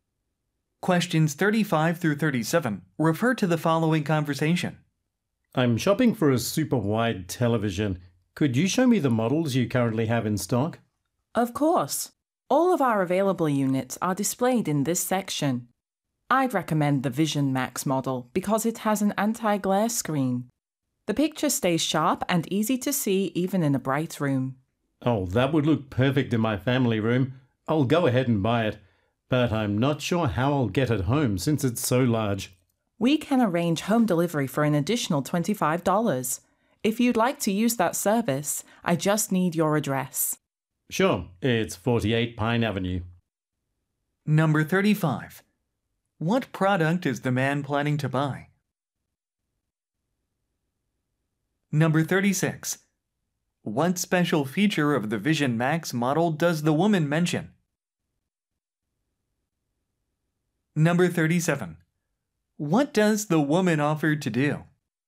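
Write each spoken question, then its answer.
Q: What product is the man planning to buy?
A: A super wide television

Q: What special feature of the Vision Max model does the woman mention?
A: An anti-glare screen

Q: What does the woman offer to do?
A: Arrange home delivery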